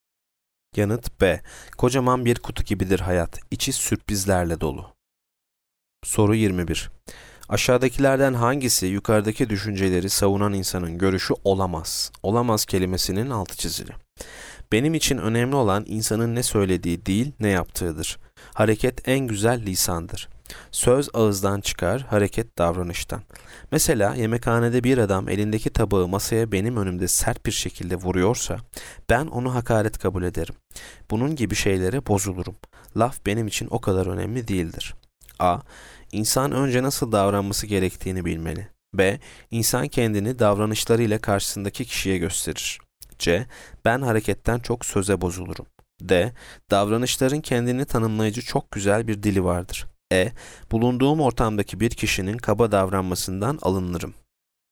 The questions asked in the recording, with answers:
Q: Aşağıdakilerden hangisi yukarıdaki düşünceleri savunan insanın görüşü olamaz?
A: Yanıt C. Ben hareketten çok söze bozulurum.